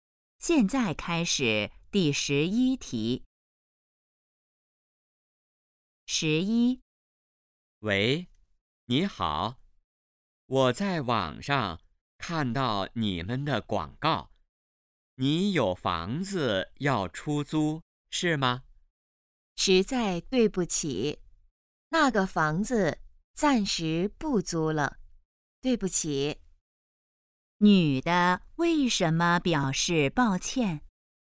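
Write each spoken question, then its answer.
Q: 女的为什么表示抱歉?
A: 房子暂时不租了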